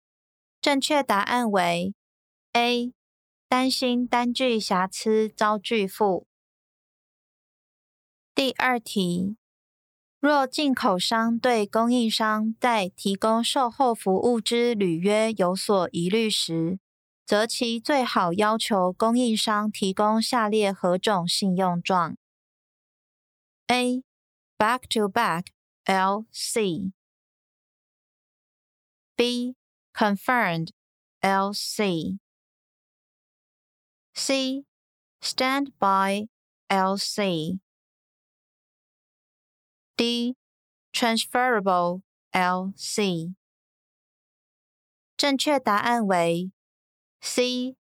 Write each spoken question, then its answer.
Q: 若进口商对供应商在提供售后服务之履约有所疑虑时,则其最好要求供应商提供下列何种信用状?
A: 正确答案为C.